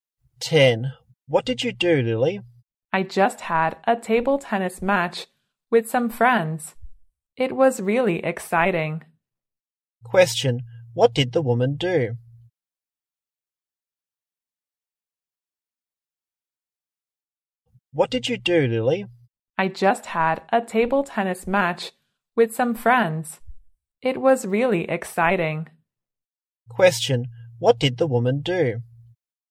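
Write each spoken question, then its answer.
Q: What did the woman do?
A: She had a table tennis match with some friends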